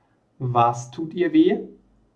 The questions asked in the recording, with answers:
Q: Was tut ihr weh?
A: Die Füße. Ihr tun die Füße weh.